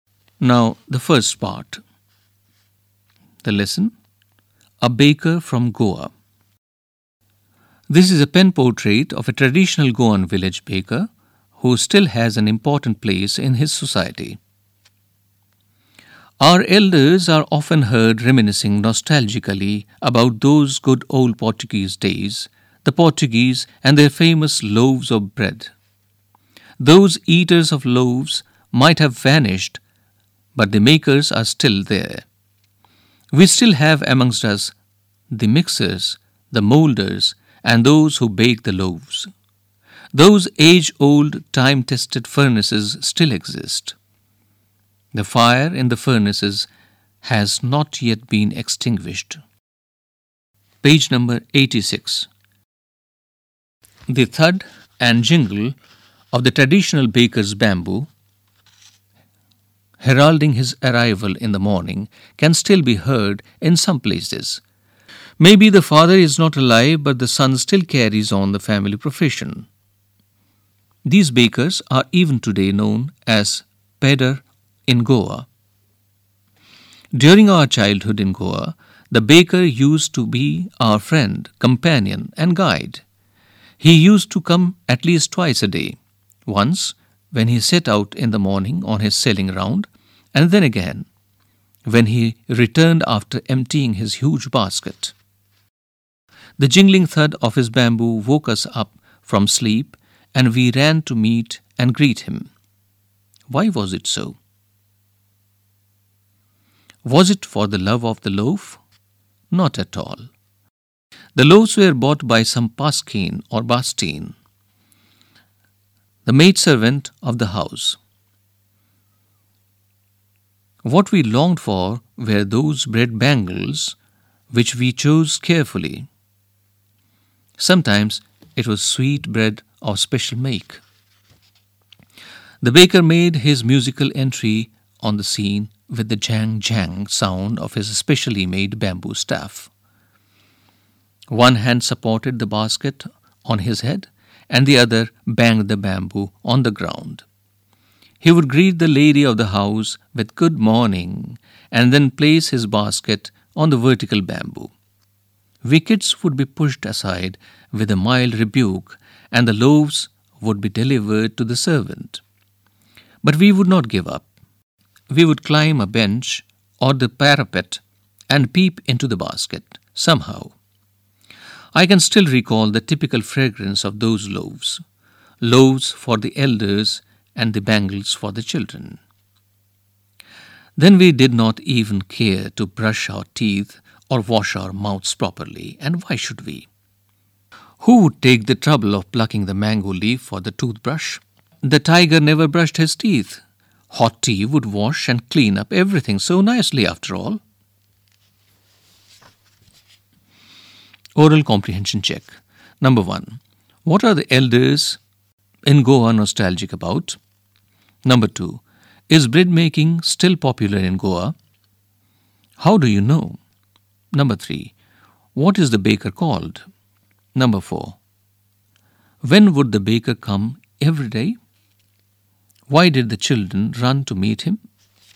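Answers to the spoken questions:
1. The good old Portuguese days and their famous loaves of bread
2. Yes; the makers, furnaces and the baker's bamboo are still there
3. Pedar (pader)
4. Twice a day: in the morning and when he returned after emptying his basket
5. For the bread bangles and sweet bread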